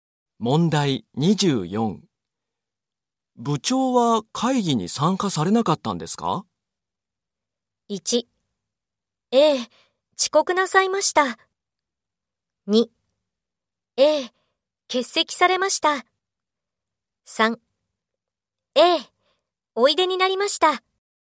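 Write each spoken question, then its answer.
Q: 部長は会議に参加されなかったんですか?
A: 3: ええ、欠席されました。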